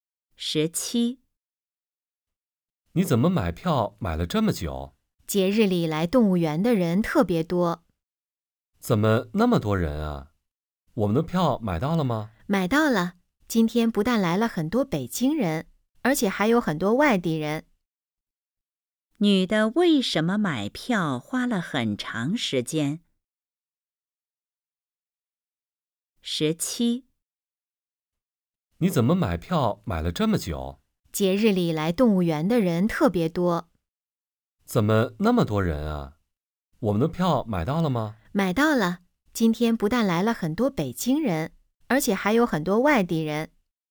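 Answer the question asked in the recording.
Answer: 节日里来动物园的人特别多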